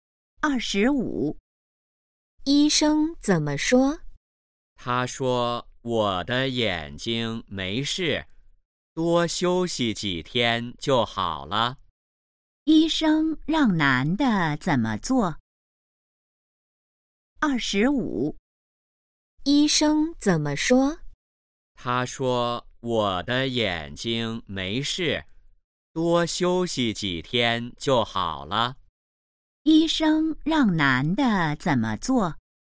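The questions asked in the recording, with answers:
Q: 医生让男的怎么做?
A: 多休息几天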